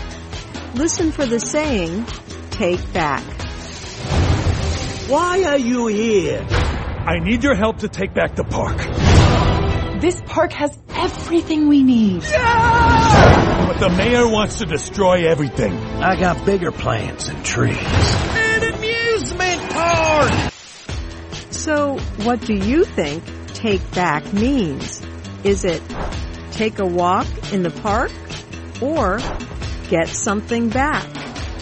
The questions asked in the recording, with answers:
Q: So, what do you think take back means?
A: Take back means to get something back.